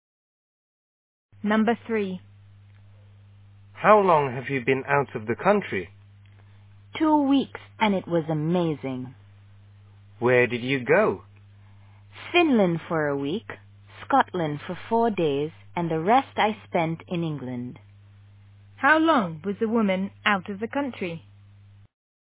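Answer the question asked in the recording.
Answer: 2 weeks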